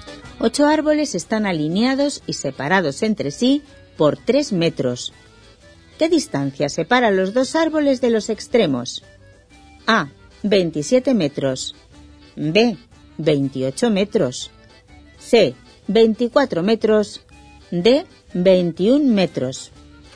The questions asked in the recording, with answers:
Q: ¿Qué distancia separa los 2 árboles de los extremos?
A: Solución. D. 21 metros.